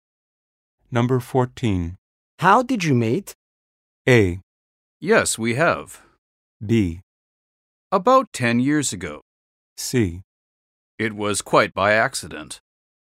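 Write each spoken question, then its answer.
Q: How did you meet?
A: C: It was quite by accident.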